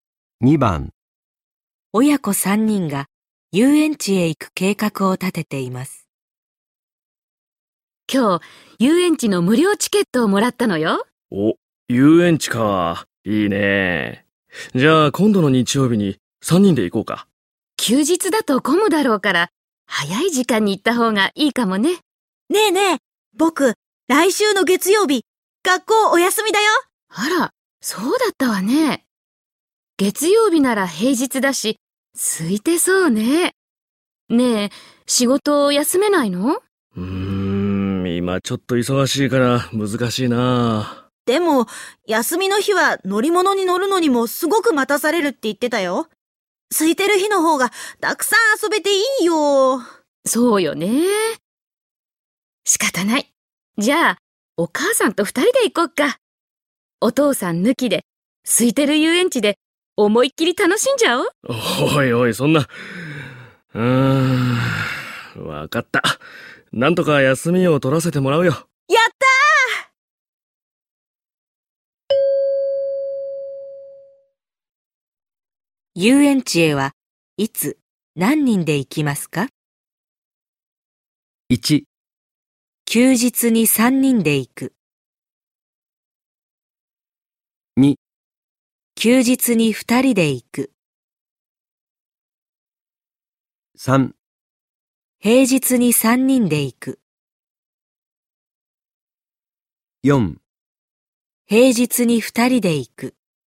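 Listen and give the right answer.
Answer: 3: 平日に三人で行く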